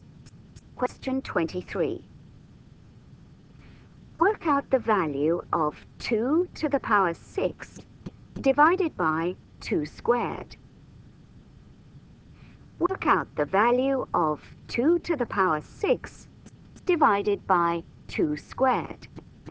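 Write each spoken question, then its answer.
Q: Work out the value of 2 to the power 6 divided by 2 squared.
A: 16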